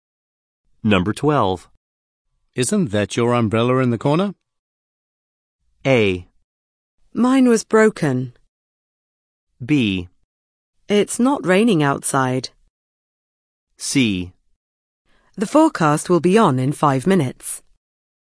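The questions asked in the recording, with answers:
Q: Isn't that your umbrella in the corner?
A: A: Mine was broken.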